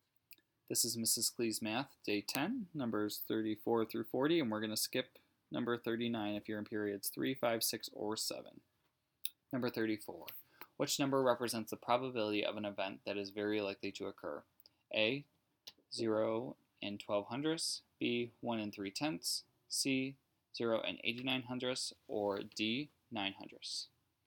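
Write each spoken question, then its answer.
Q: Which number represents the probability of an event that is very likely to occur?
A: C: 0 and 89 hundredths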